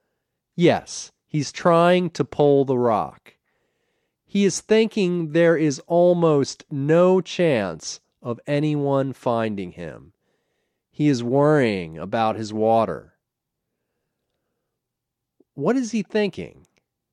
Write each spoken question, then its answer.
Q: What is he thinking?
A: He's thinking there is no chance of anyone finding him.